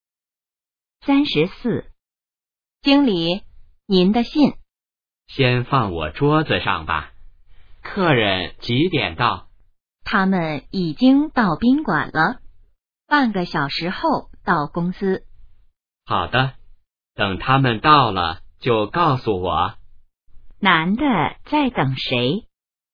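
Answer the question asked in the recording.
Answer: 客人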